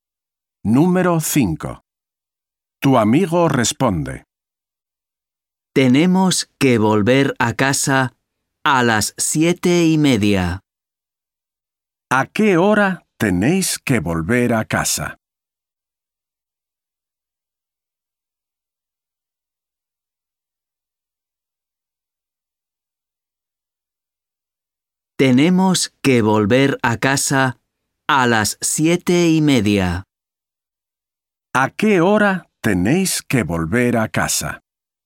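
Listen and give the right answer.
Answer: A las 7:30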